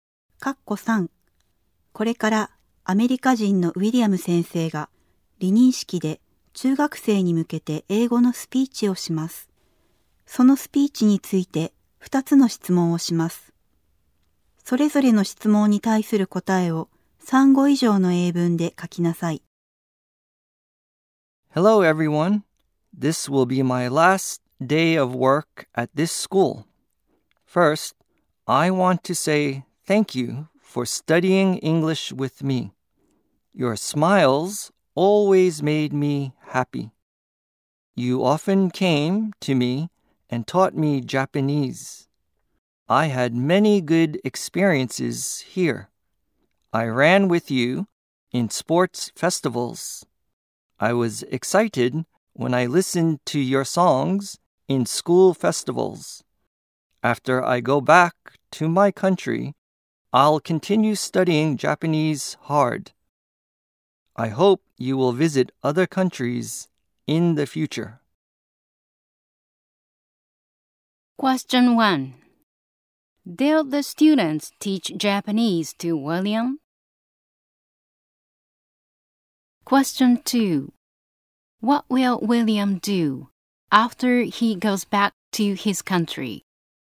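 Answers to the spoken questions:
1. Yes, they did.
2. He will continue studying Japanese hard.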